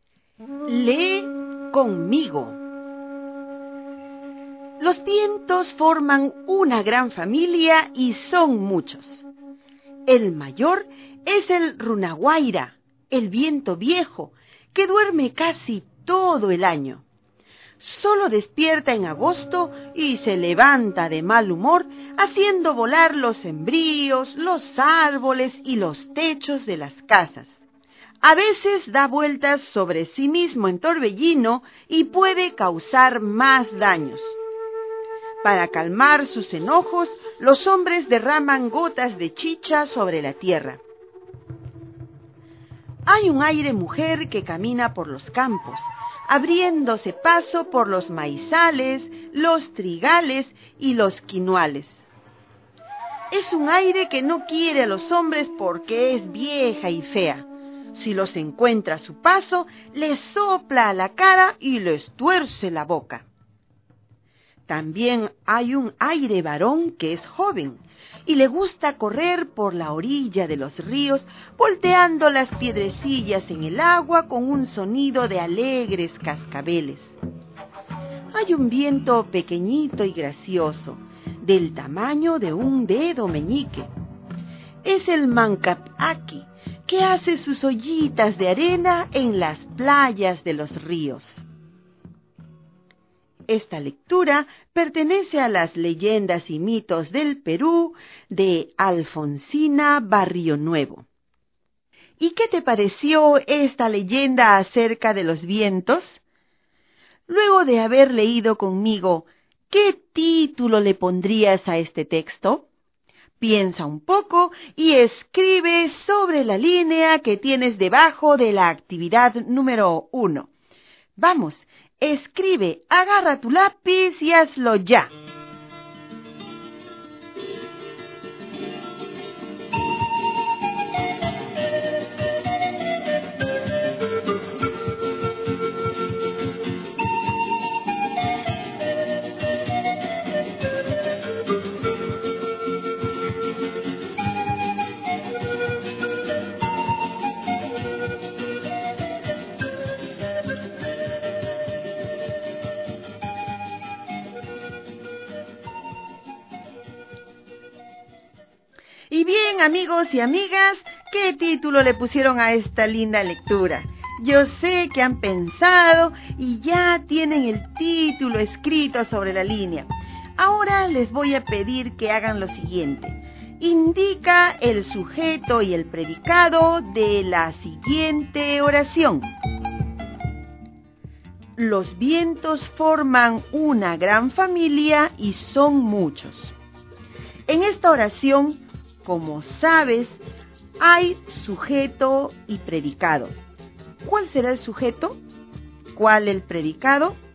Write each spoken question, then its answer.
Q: ¿Cuál será el sujeto?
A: Entonces, el sujeto de esta oración es los vientos.

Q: ¿Cuál el predicado?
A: Forman una gran familia y son muchos.